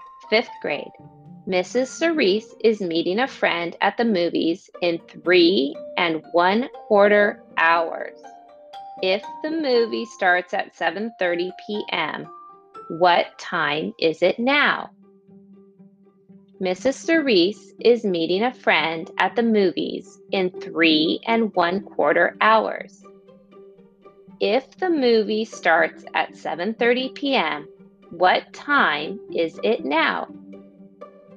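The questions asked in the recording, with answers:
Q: If the movie starts at 7:30 p.m., what time is it now?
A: 4:15 p.m.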